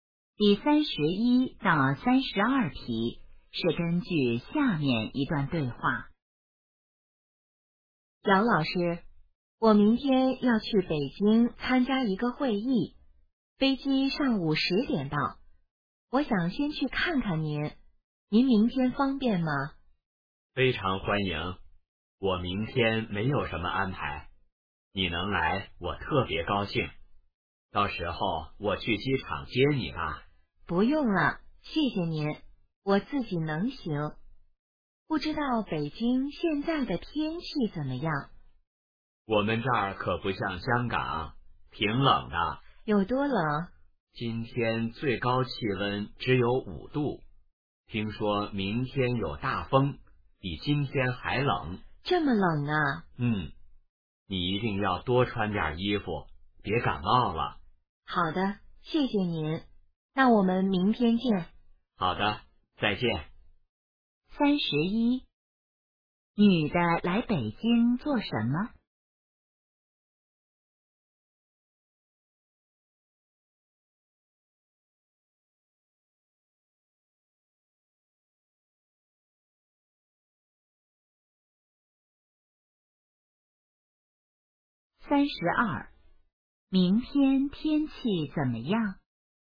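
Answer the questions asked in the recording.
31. 参加一个会议
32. 有大风,比今天还冷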